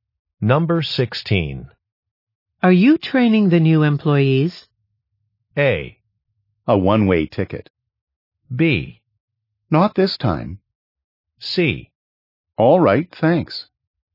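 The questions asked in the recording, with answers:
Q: Are you training the new employees?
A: B: Not this time.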